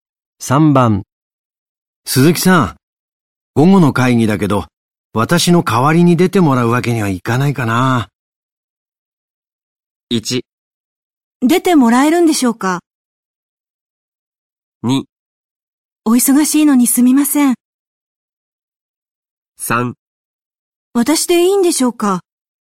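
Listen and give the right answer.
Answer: 3: 私でいいんでしょうか。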